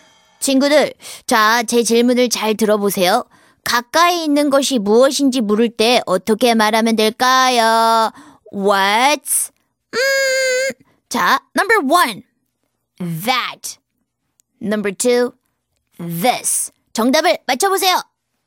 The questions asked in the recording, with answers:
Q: 가까이 있는 것이 무엇인지 물을 때 어떻게 말하면 될까요?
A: 정답은 바로 2번 What's this이죠?